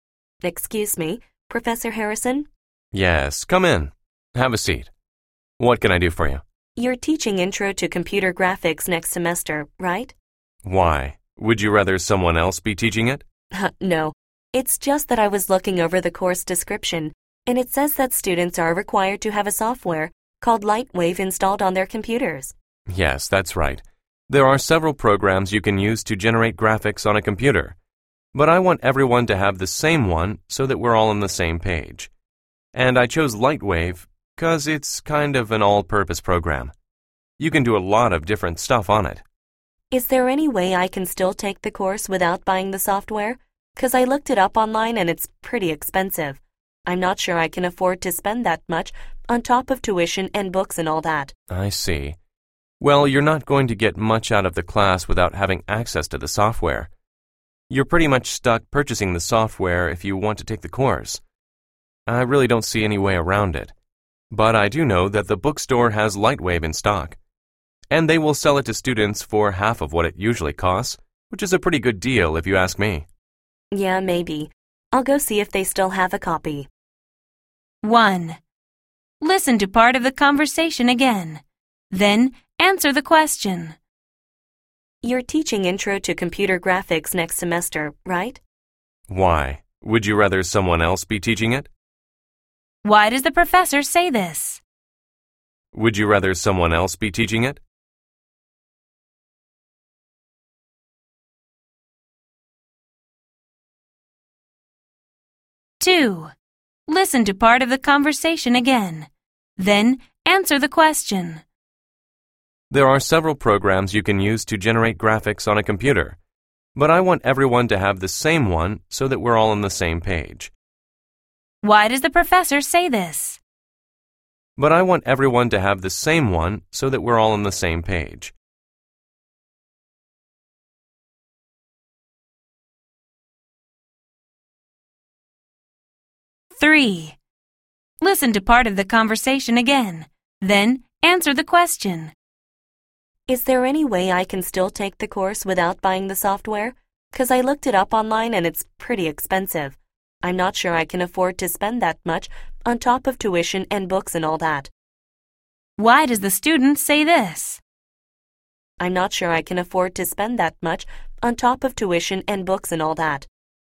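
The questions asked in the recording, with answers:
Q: Why does the professor say this?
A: To explain why all students have to use the same software

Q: Why does the student say this?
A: To explain that he can't afford the expensive software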